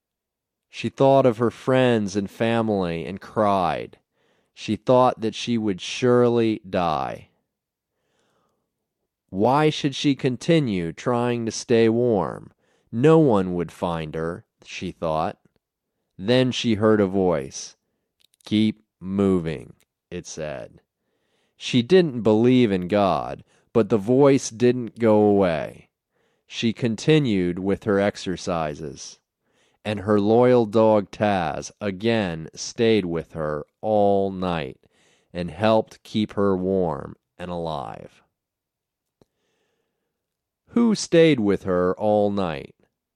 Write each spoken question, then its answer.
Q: Who stayed with her all night?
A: Taz stayed with her all night.